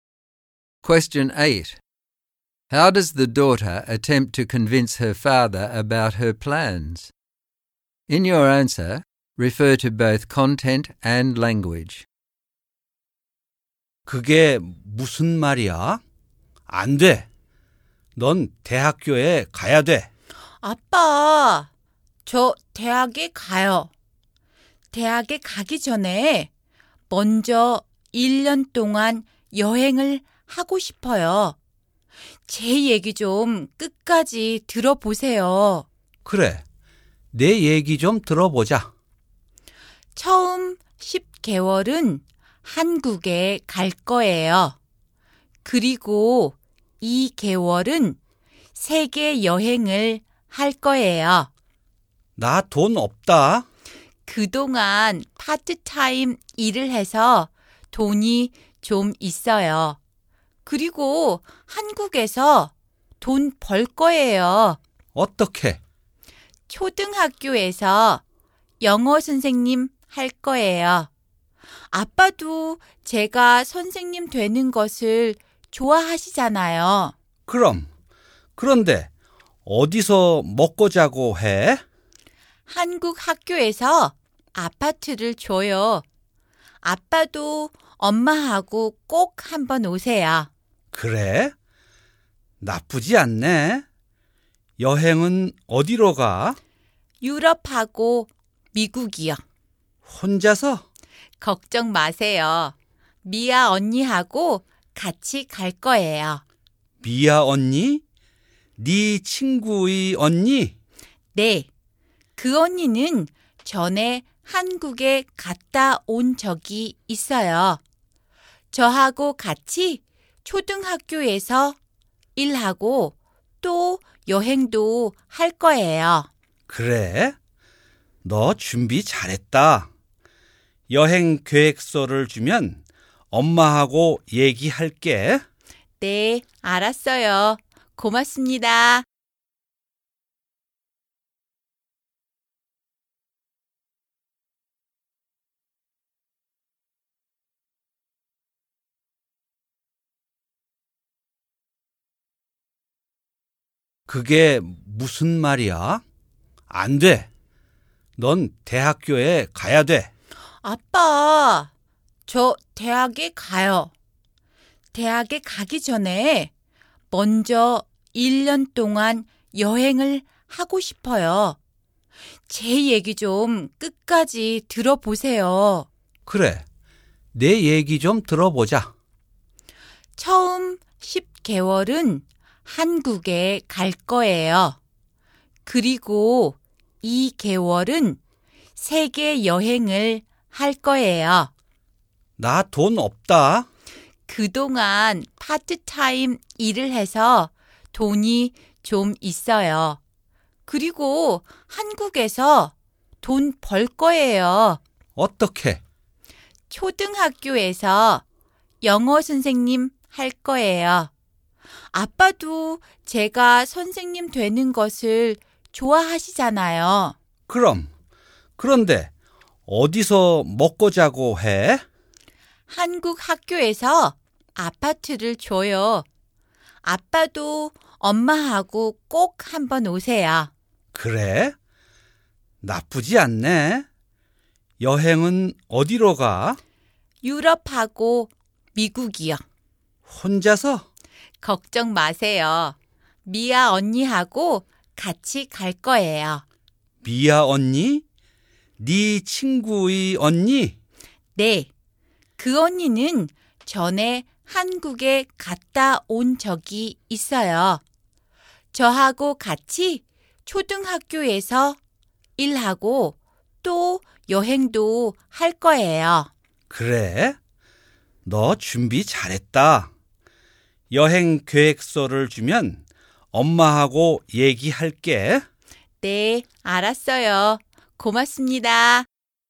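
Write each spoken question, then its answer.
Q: How does the daughter attempt to convince her father about her plans?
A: She says she will still go to university; she has money from part-time work and will earn more teaching English at a primary school in Korea, which he would like; the school gives her an apartment; and she will travel with Mia's older sister, who has been to Korea before. She speaks politely, asks him to hear her out and invites her parents to visit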